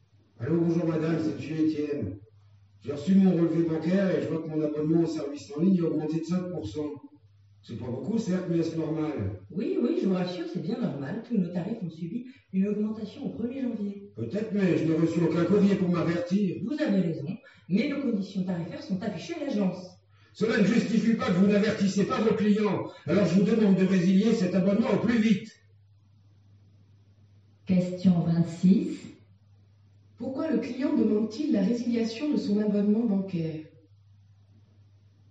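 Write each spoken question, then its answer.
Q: Pourquoi le client demande-t-il la résiliation de son abonnement bancaire?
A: Parce que le tarif a augmenté de 5% sans qu'il en soit averti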